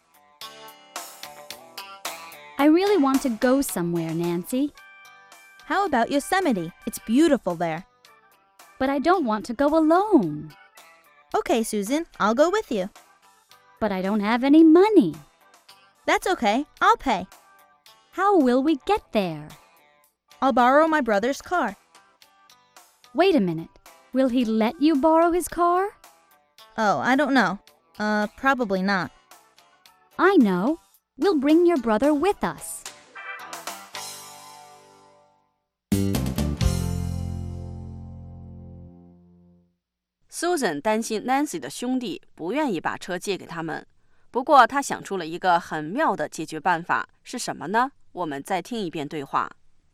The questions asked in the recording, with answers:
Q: 不过她想出了一个很妙的解决办法,是什么呢?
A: I know. We'll bring your brother with us.